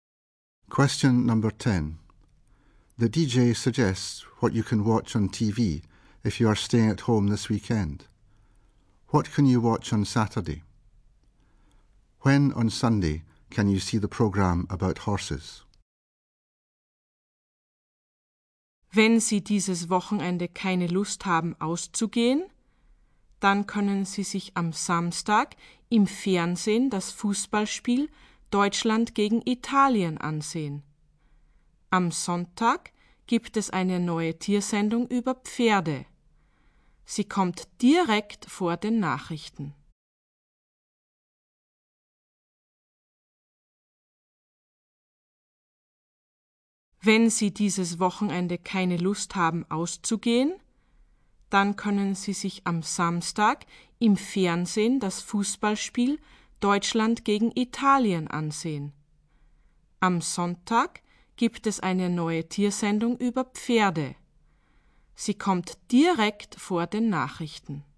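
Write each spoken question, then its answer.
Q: What can you watch on Saturday?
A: The football match Germany v Italy

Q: When on Sunday can you see the program about horses?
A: Just before the news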